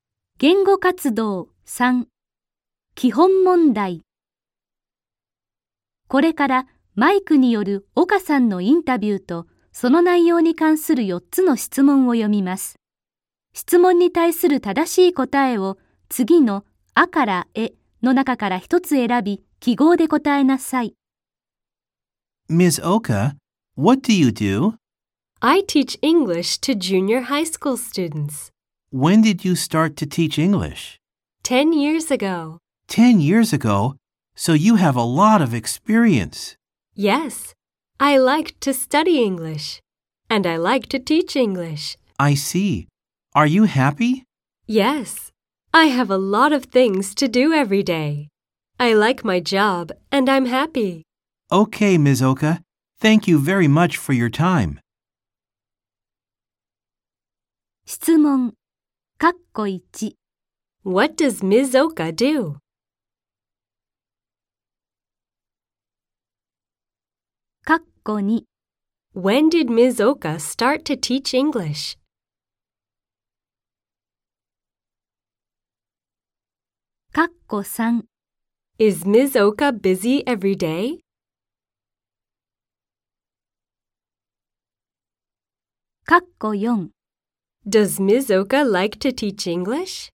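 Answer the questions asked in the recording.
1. She teaches English to junior high school students.
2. 10 years ago.
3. Yes, she is.
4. Yes, she does.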